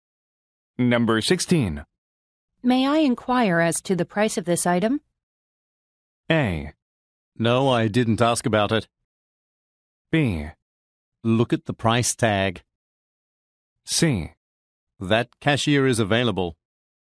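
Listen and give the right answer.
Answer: B: Look at the price tag.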